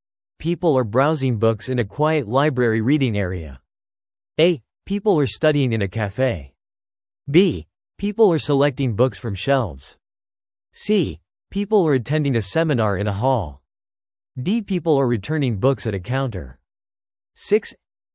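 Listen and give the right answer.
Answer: B: People are selecting books from shelves.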